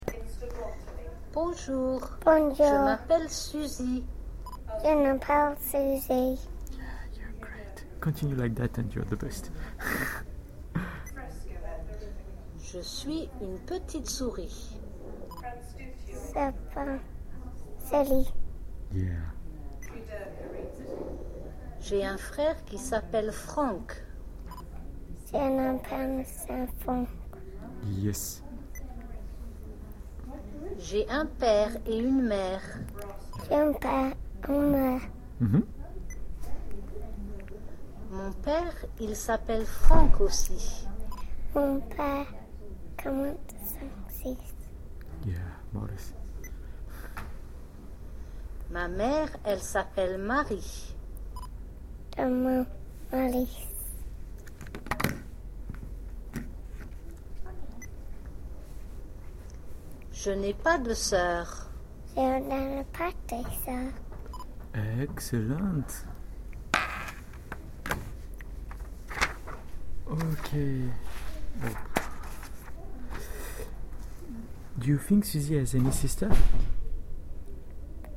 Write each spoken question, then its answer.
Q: Do you think Suzy has any sister?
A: No, she doesn't have.